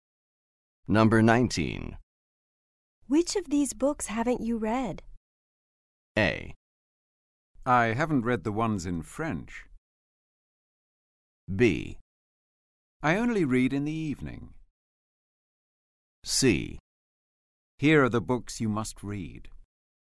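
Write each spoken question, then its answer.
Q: Which of these books haven't you read?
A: A: I haven't read the ones in French.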